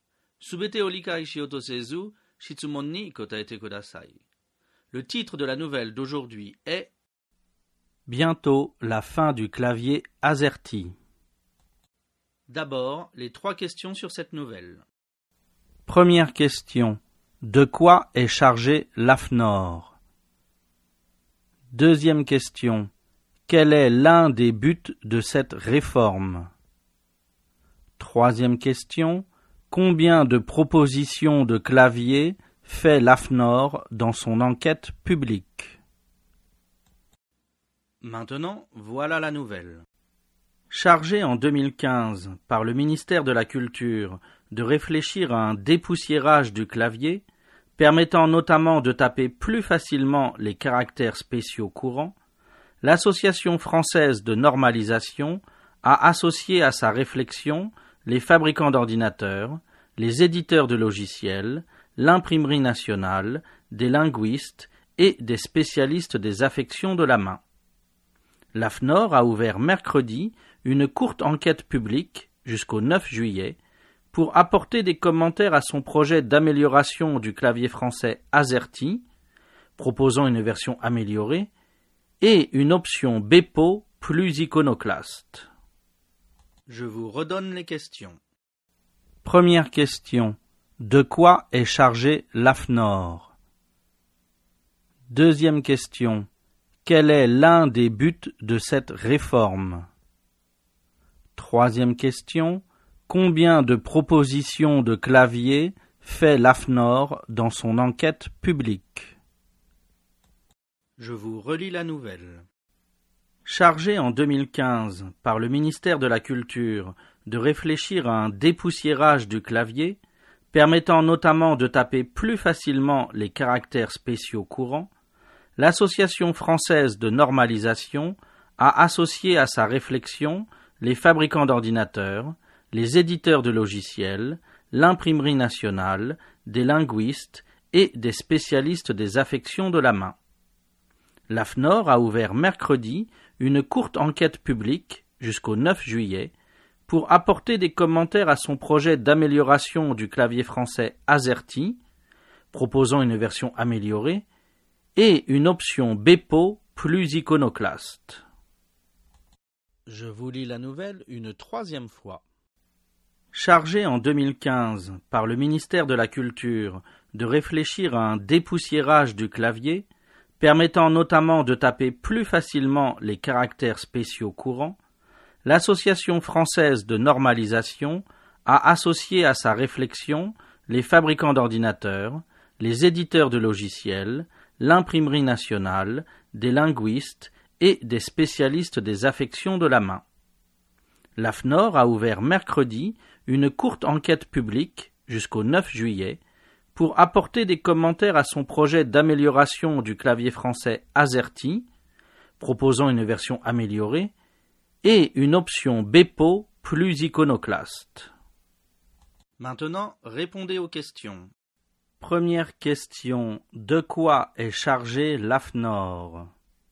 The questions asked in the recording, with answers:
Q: De quoi est chargé l'AFNOR?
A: L'AFNOR est chargé d'un dépoussiérage du clavier français.

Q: Quel est l'un des buts de cette réforme?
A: L'un des buts est de taper plus facilement les caractères spéciaux courants.

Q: Combien de propositions de claviers fait l'AFNOR dans son enquête publique?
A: L'AFNOR propose deux claviers différents.